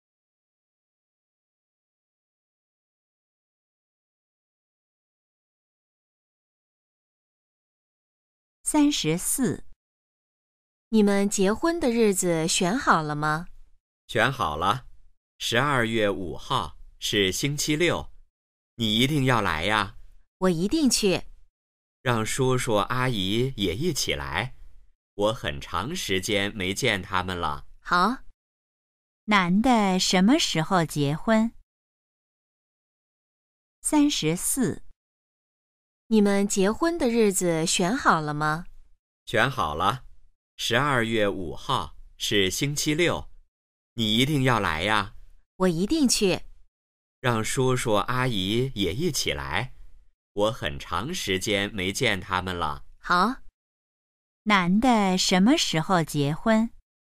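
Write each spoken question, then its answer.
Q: 男的什么时候结婚?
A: 12月5号(星期六)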